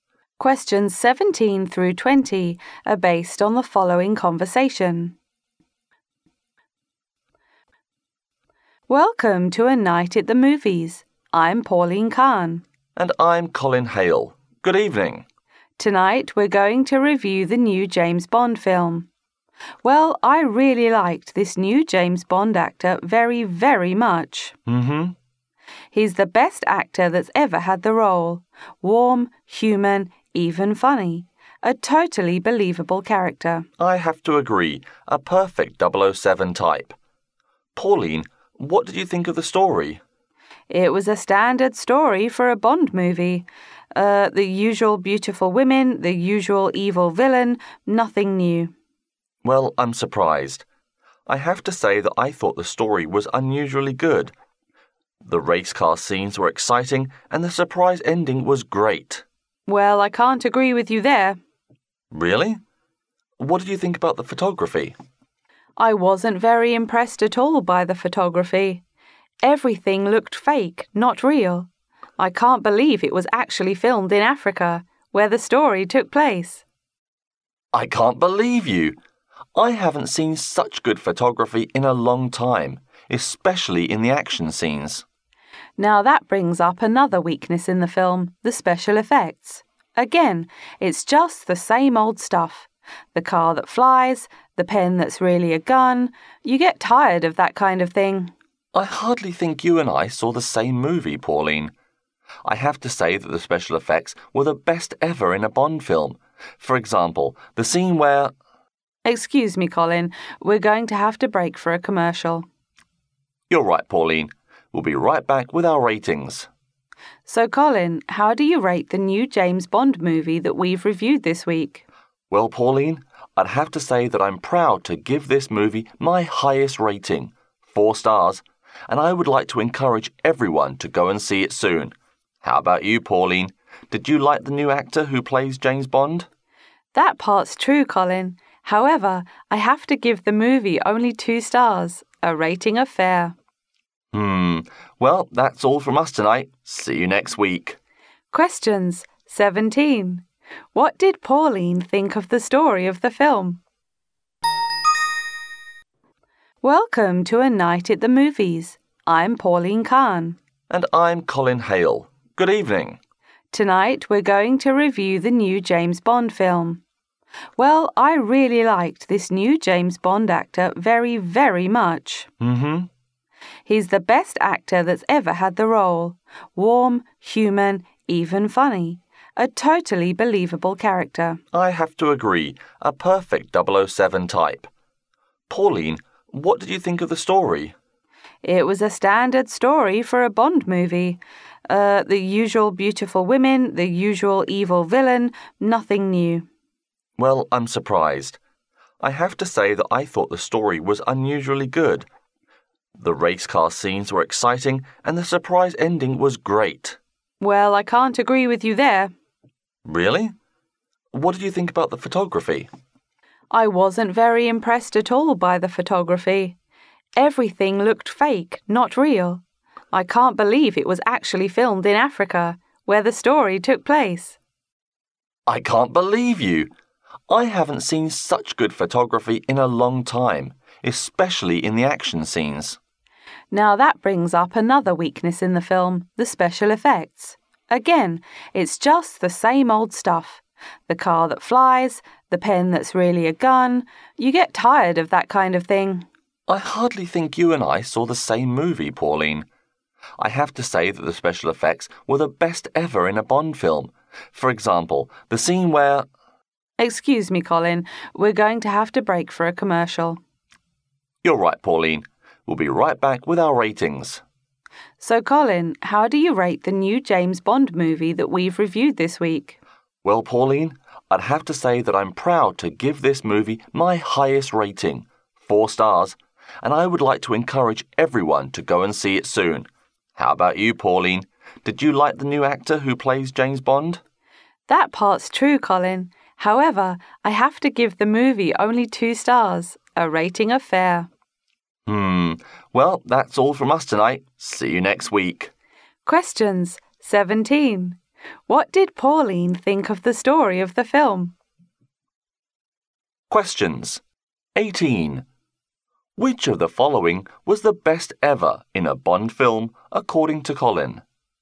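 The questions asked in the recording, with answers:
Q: What did Pauline think of the story of the film?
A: It was a standard story with nothing new

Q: Which of the following was the best ever in a Bond film, according to Colin?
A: The special effects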